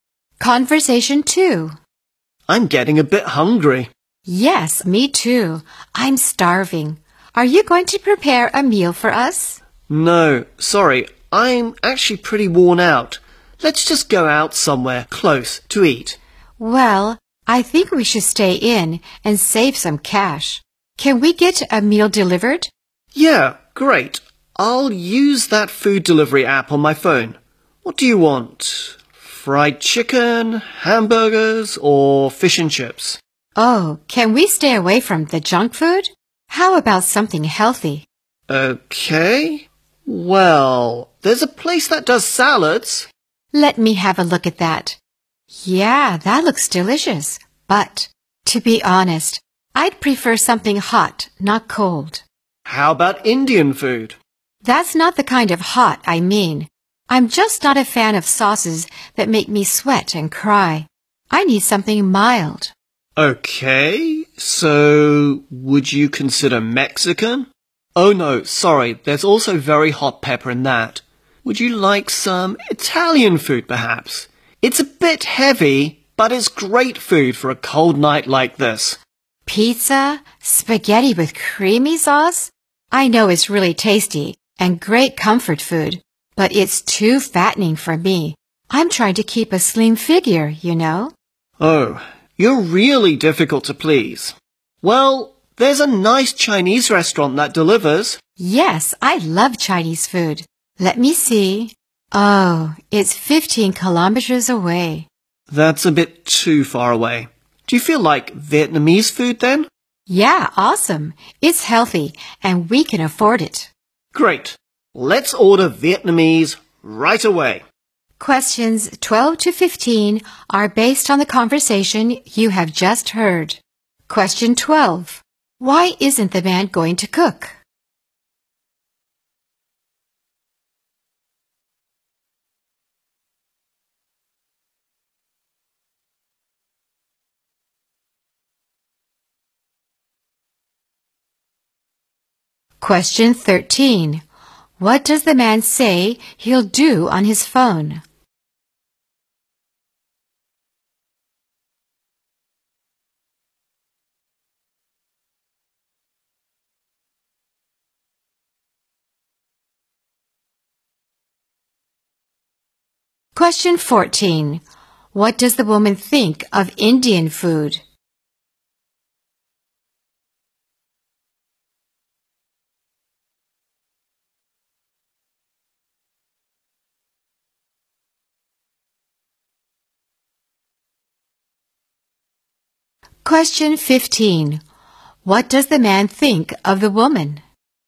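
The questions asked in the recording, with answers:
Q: Why isn't the man going to cook?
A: He is worn out

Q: What does the man say he'll do on his phone?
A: Use a food delivery app to order a meal

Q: What does the woman think of Indian food?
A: It is too spicy/hot for her

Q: What does the man think of the woman?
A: She is difficult to please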